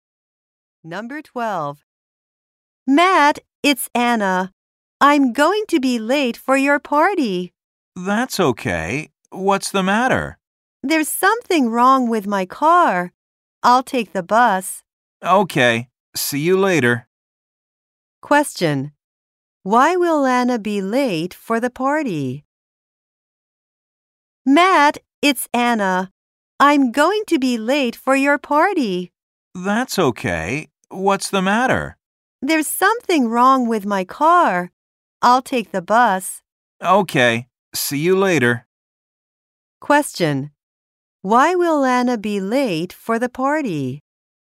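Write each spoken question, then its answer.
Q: Why will Anna be late for the party?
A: Something is wrong with her car.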